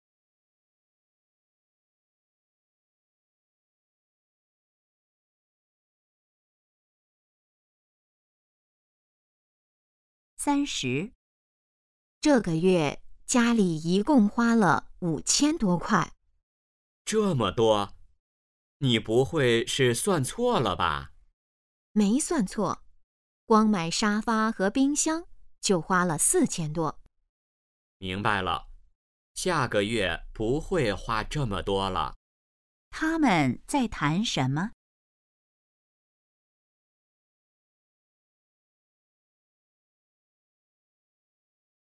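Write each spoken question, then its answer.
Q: 他们在谈什么?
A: 这个月家里花的钱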